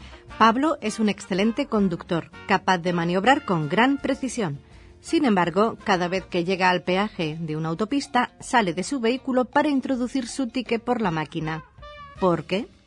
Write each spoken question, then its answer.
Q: ¿Por qué?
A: Solución, porque tiene un coche en el que el volante está a la derecha.